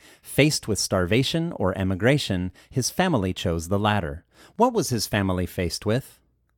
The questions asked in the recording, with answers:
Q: What was his family faced with?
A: His family was faced with starvation or emigration.